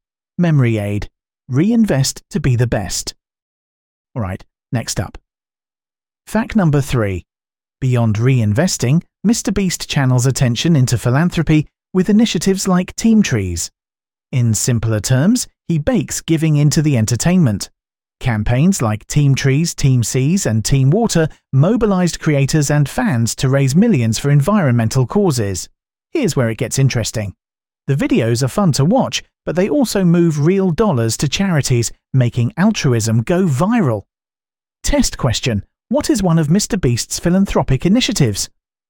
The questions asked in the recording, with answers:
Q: What is one of MrBeast's philanthropic initiatives?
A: Correct answer. Team Trees.